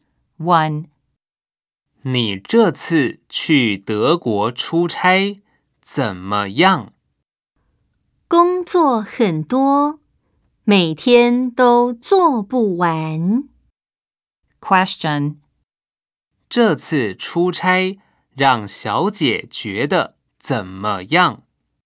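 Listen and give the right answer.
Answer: 很忙,工作很多,每天都做不完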